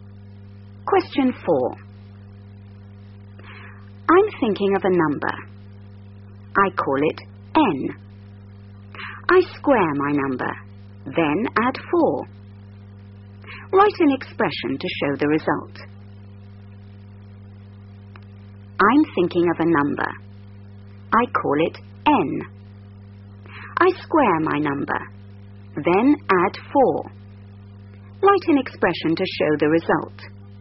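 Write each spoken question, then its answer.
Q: Write an expression to show the result.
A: n2 + 4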